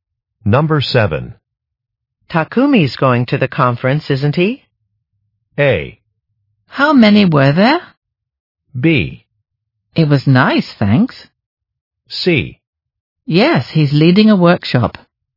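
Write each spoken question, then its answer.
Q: Takumi's going to the conference, isn't he?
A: C: Yes, he's leading a workshop.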